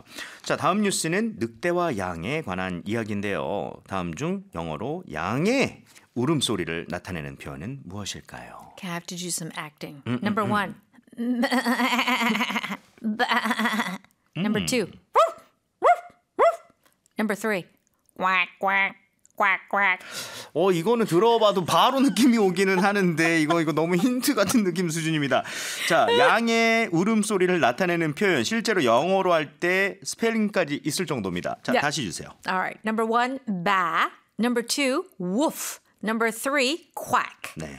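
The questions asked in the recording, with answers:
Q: 다음 중 영어로 양의 울음소리를 나타내는 표현은 무엇일까요?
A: 1: ba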